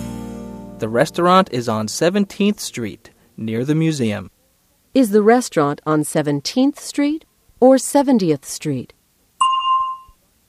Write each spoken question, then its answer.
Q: Is the restaurant on 17th Street or 70th Street?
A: It's on 17th Street. 17.